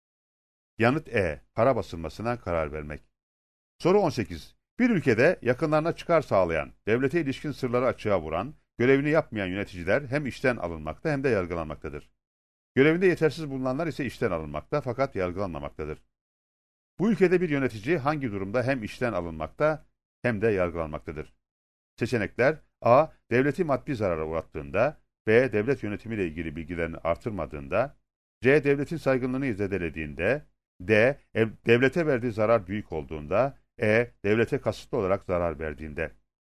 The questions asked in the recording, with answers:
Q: Bu ülkede bir yönetici hangi durumda hem işten alınmakta hem de yargılanmaktadır?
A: Yanıt E. Devlete kasıtlı olarak zarar verdiğinde.